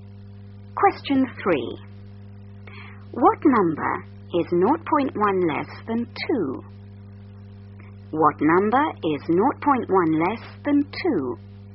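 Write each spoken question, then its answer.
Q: What number is 0.1 less than 2?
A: 1.9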